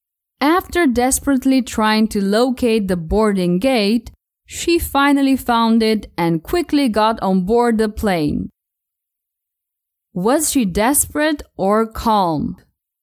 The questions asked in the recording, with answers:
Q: Was she desperate or calm?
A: She wasn't calm at all. She was actually desperate.